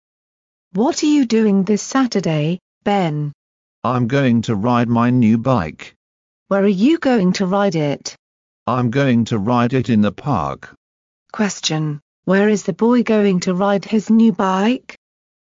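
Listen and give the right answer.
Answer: In the park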